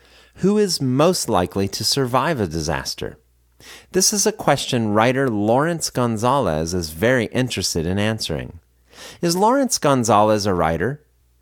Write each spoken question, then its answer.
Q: Is Lawrence Gonzalez a writer?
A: Yes, he is a writer.